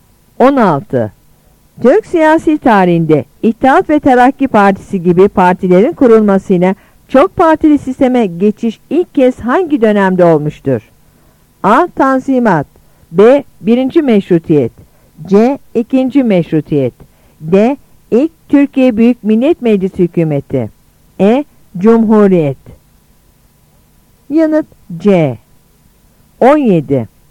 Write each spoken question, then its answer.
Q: Türk siyasi tarihinde İttihat ve Terakki Partisi gibi partilerin kurulmasıyla çok partili sisteme geçiş ilk kez hangi dönemde olmuştur?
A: Yanıt C.